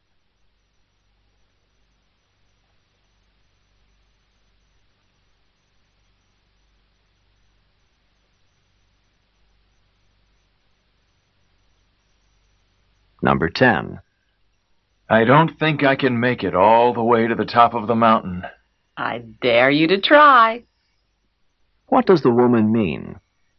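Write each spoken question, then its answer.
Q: What does the woman mean?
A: She challenges him to try to reach the top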